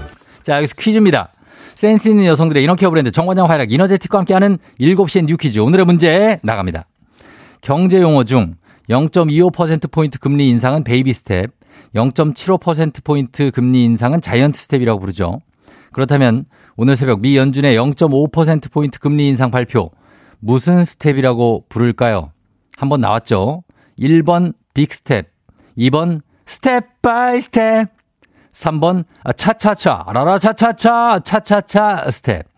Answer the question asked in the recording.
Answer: 정답은 1번 빅스텝입니다.